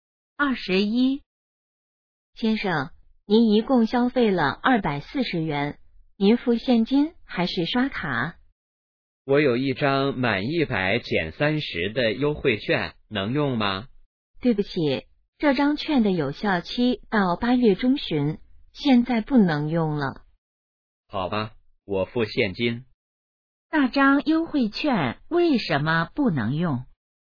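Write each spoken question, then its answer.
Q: 那张优惠券为什么不能用?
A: 已经过了有效期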